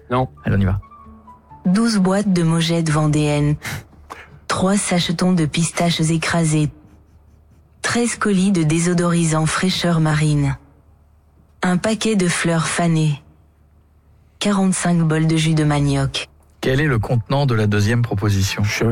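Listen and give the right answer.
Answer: des sachetons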